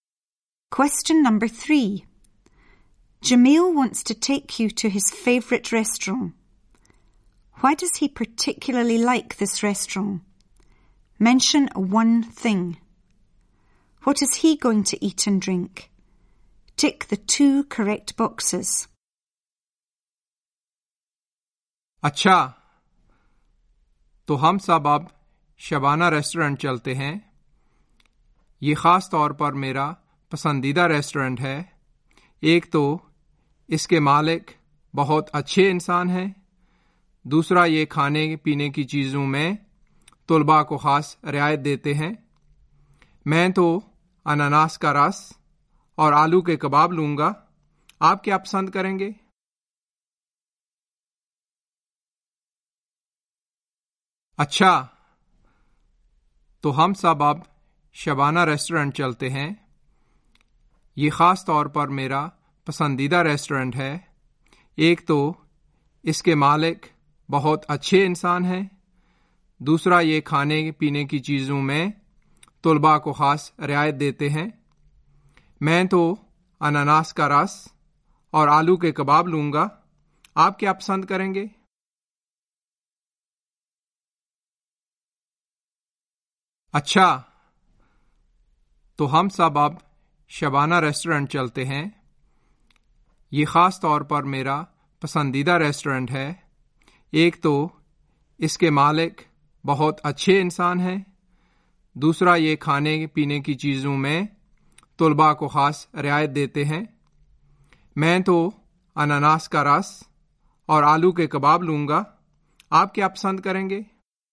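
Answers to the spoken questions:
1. The owner is a very nice person; it gives students a special discount on food and drink
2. Potato kebabs and pineapple juice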